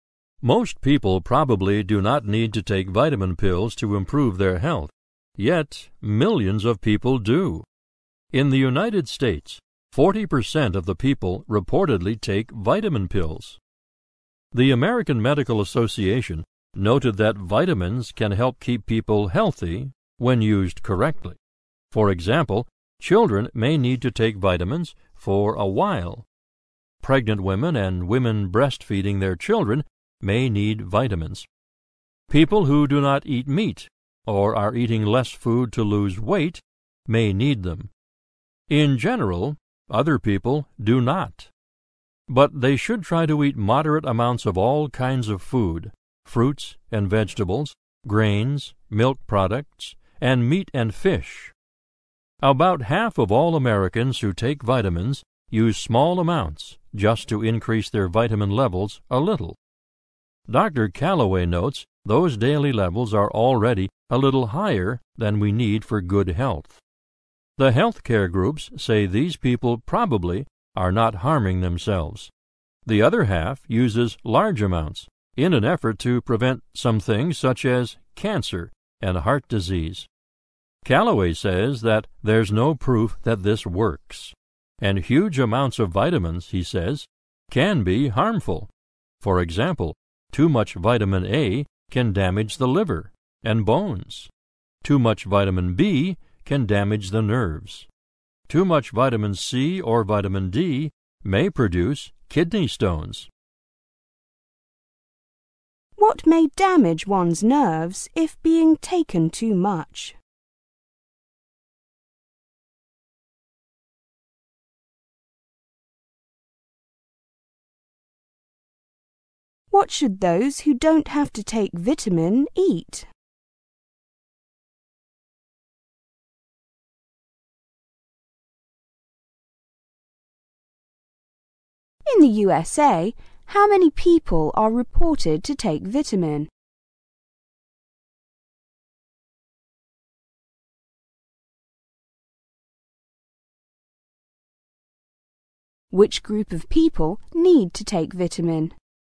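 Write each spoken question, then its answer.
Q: What may damage one's nerves if being taken too much?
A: Vitamin B

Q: What should those who don't have to take vitamin eat?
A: Moderate amounts of all kinds of food: fruits and vegetables, grains, milk products, and meat and fish

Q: In the USA, how many people are reported to take vitamin?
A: 40%

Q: Which group of people need to take vitamin?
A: Children, pregnant or breastfeeding women, and people who don't eat meat or are eating less to lose weight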